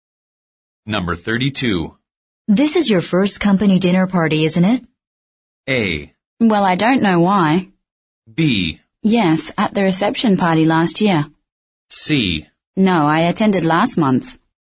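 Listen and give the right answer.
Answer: C: No, I attended last month.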